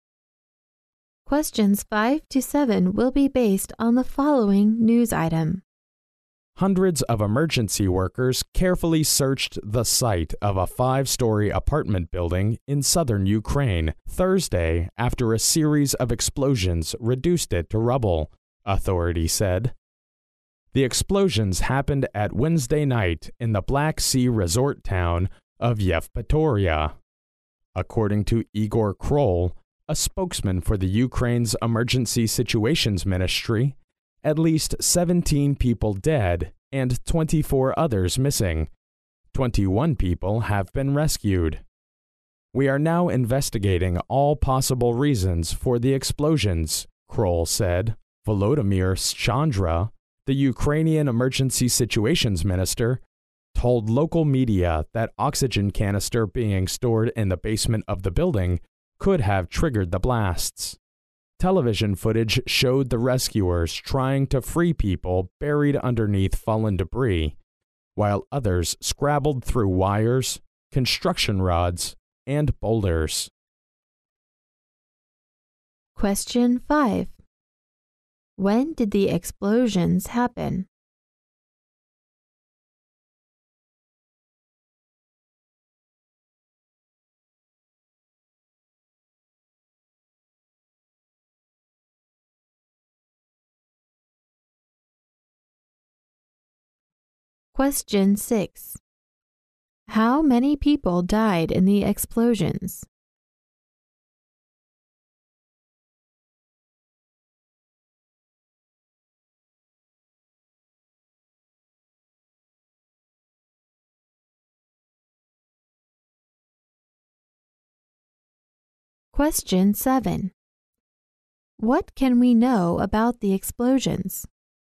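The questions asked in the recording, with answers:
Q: When did the explosions happen?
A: On Wednesday night

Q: How many people died in the explosions?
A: At least 17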